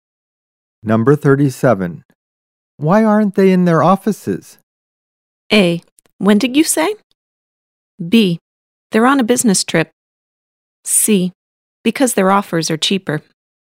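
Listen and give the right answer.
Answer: B: They're on a business trip.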